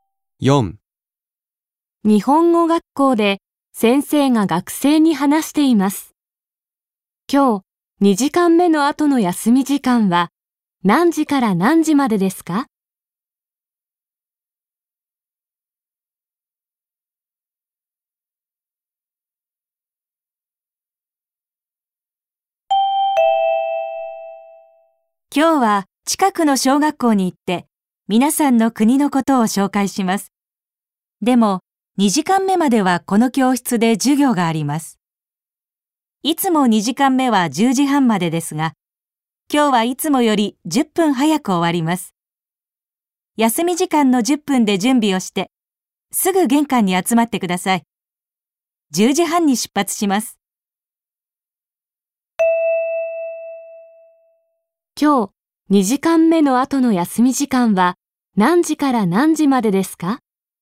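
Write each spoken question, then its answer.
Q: 今日、2時間目の後の休み時間は何時から何時までですか?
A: 10時20分から10時半まで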